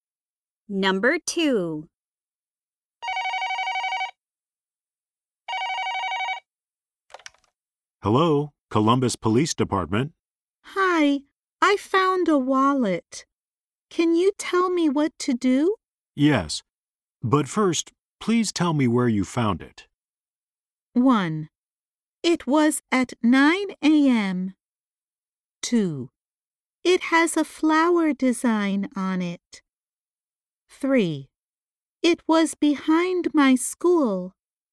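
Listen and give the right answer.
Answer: 3: It was behind my school.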